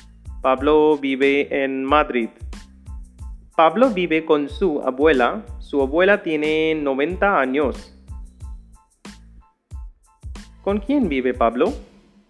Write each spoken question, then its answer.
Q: ¿Con quién vive Pablo?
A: Pablo vive con su abuela.